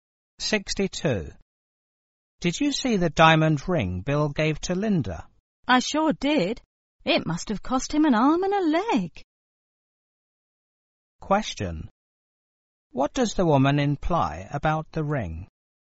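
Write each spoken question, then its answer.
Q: What does the woman imply about the ring?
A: It was very expensive.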